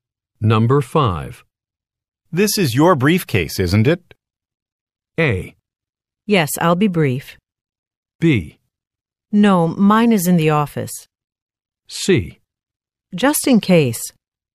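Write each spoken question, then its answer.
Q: This is your briefcase, isn't it?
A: B: No, mine is in the office.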